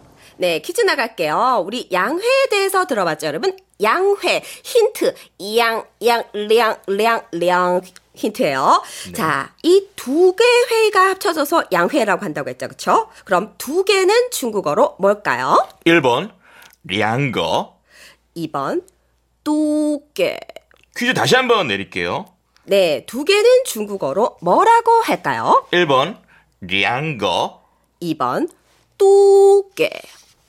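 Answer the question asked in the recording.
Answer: 1번: 량거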